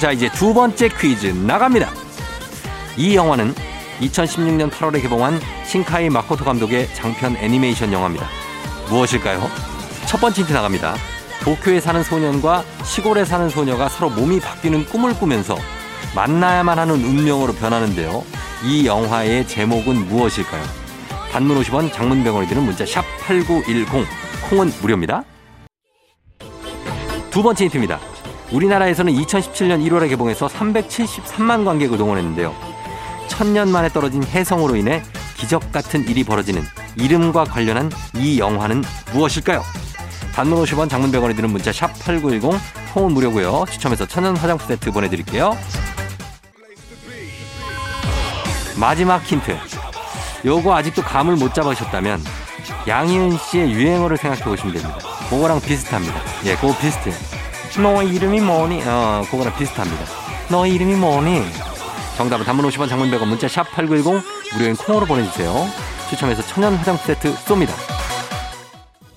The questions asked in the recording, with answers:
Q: 이 영화의 제목은 무엇일까요?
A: 정답은 바로 두구두구두구두구두구두구 너의 이름은 이죠.